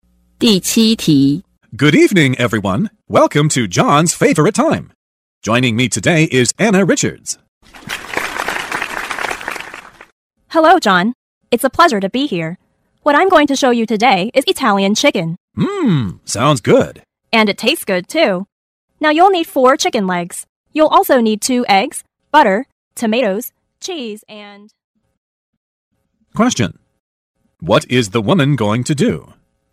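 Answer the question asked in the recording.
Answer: Show how to cook Italian chicken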